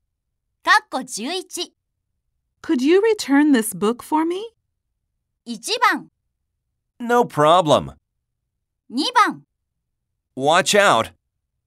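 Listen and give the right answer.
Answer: 1: No problem.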